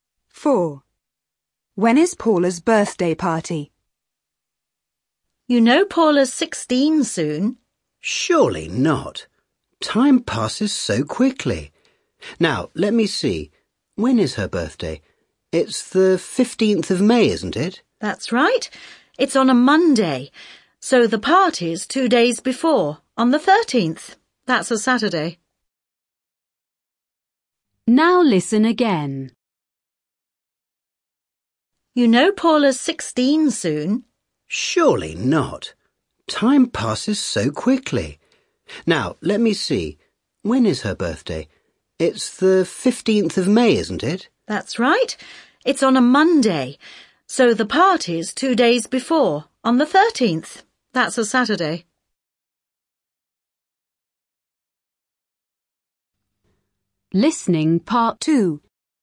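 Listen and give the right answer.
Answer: Saturday the 13th of May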